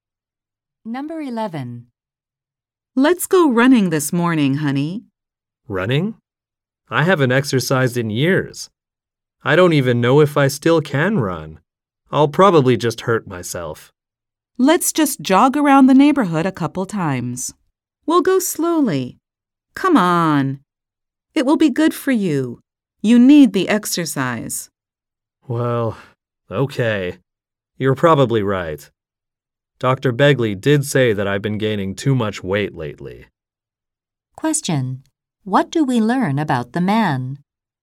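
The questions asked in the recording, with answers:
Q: What do we learn about the man?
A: He hasn't exercised in years and has gained weight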